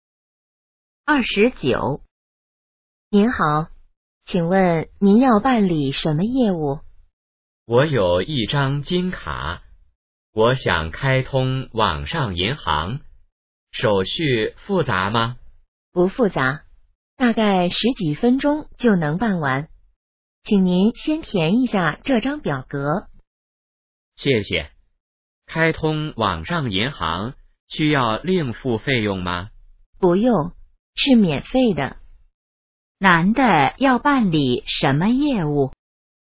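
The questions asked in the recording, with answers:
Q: 男的要办理什么业务?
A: 开通网上银行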